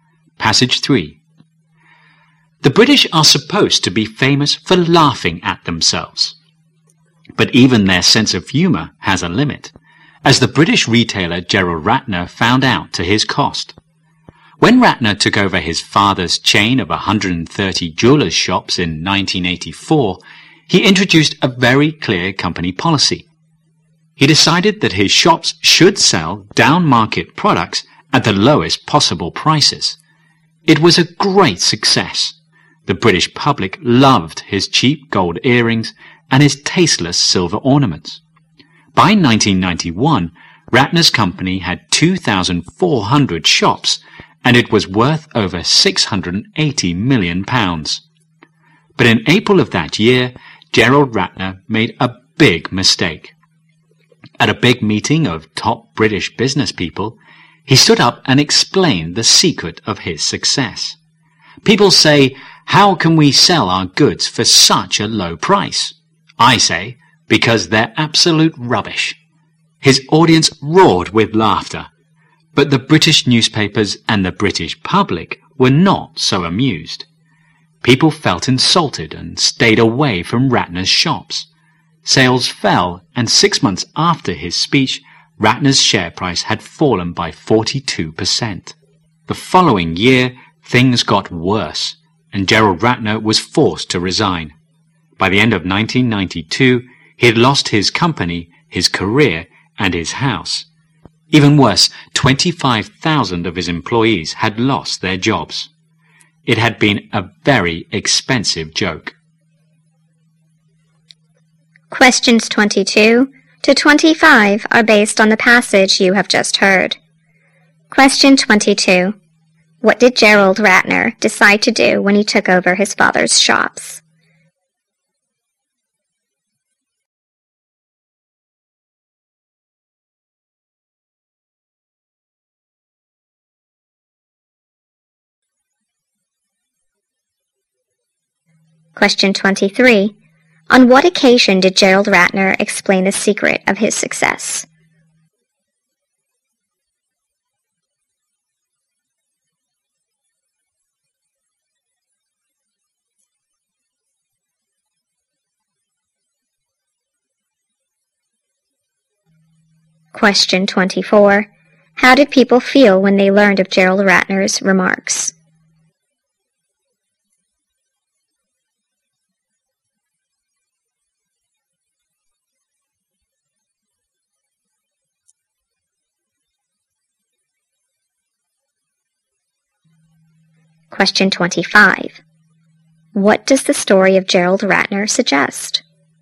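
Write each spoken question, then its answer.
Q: What did Gerald Ratner decide to do when he took over his father's shops?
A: Sell down-market products at the lowest possible prices.

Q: On what occasion did Gerald Ratner explain the secret of his success?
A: At a big meeting of top British business people.

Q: How did people feel when they learned of Gerald Ratner's remarks?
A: Insulted.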